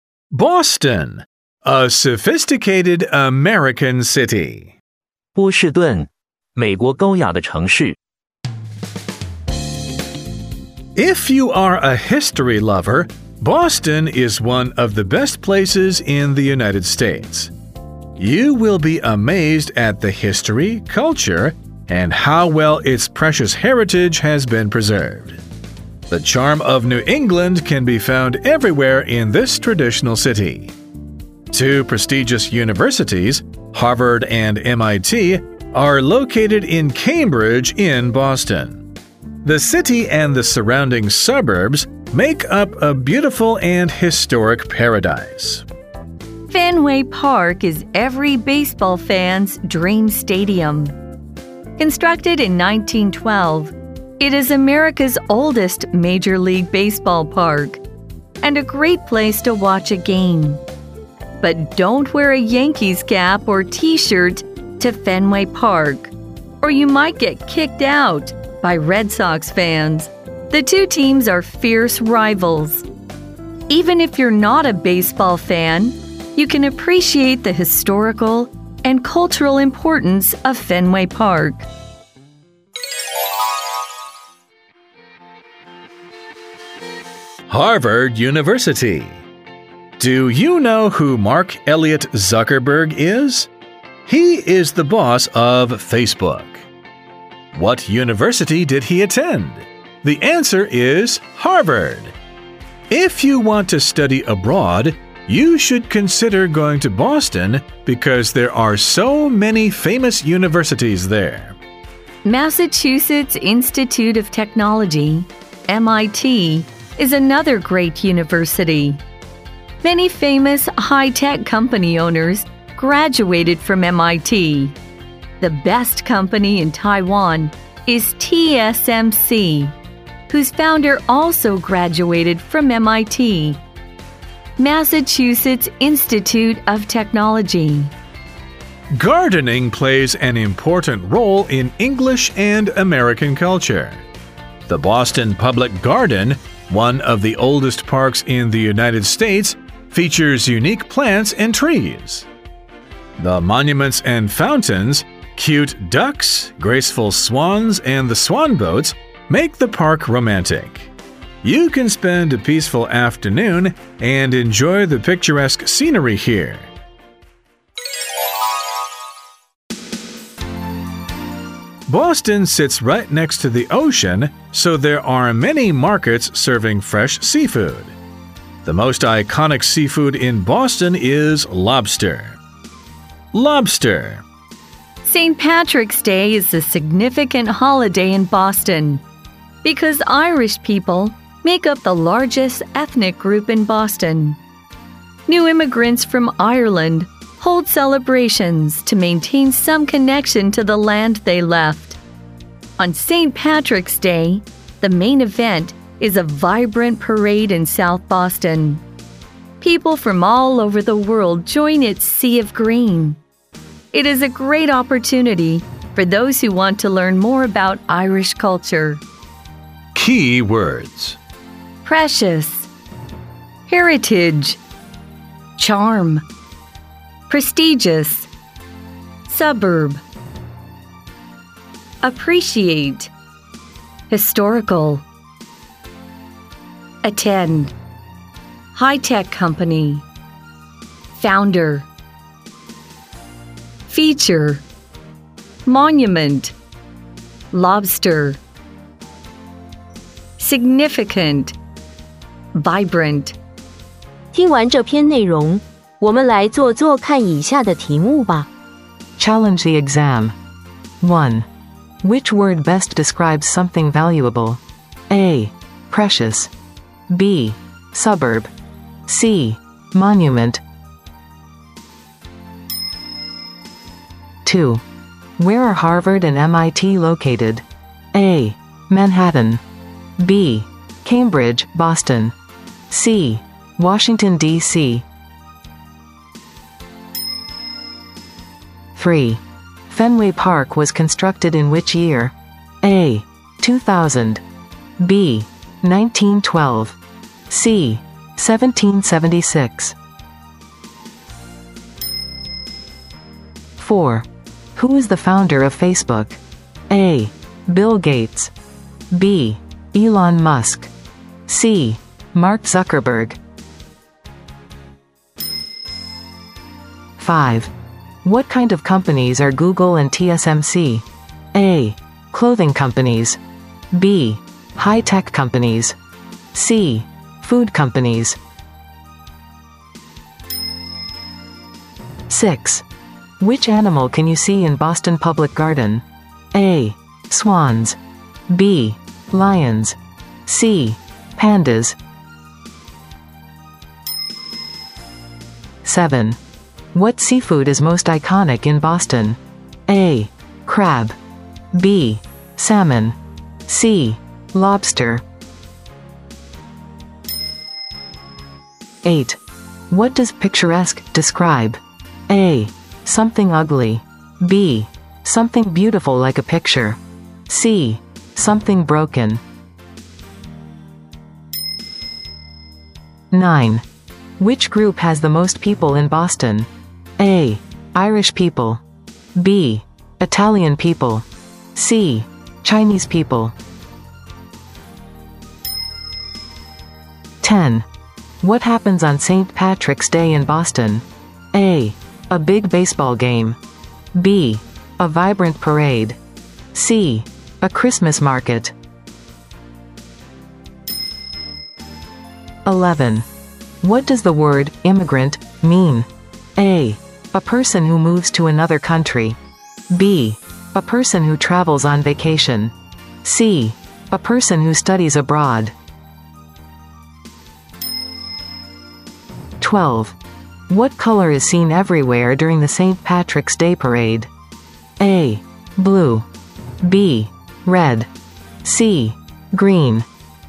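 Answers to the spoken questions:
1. A: Precious
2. B: Cambridge, Boston
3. B: 1912
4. C: Mark Zuckerberg
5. B: High-tech companies
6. A: Swans
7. C: Lobster
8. B: Something beautiful like a picture
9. A: Irish people
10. B: A vibrant parade
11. A: A person who moves to another country
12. C: Green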